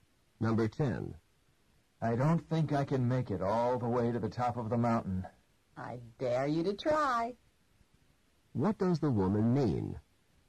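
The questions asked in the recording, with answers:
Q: What does the woman mean?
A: She challenges him to try to reach the top.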